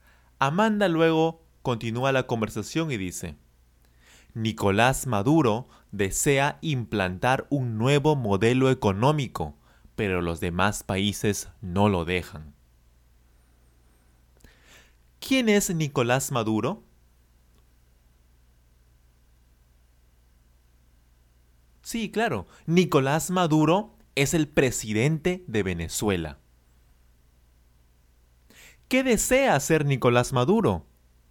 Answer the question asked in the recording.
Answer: Él desea implantar un nuevo modelo económico.